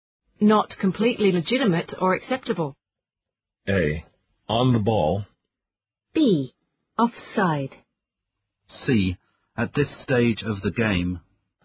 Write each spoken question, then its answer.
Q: Not completely legitimate or acceptable.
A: The answer is B. Offside.